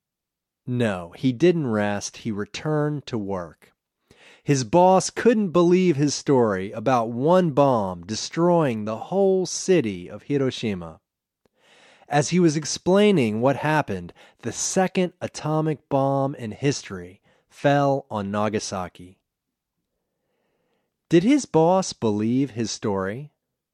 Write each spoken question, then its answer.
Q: Did his boss believe his story?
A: No, his boss didn't believe his story.